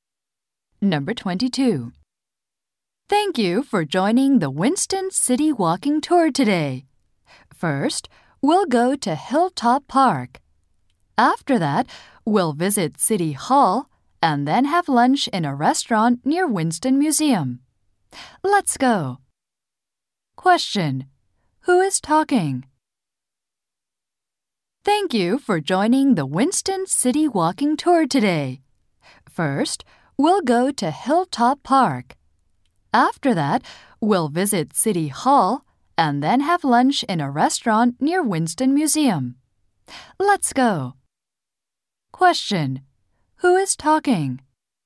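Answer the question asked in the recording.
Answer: A tour guide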